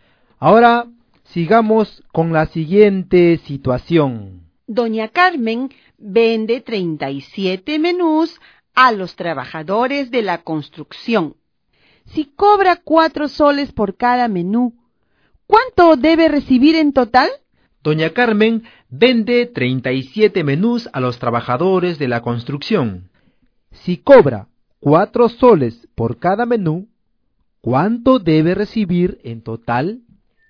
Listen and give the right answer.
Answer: Doña Carmen recibirá 148 soles en total.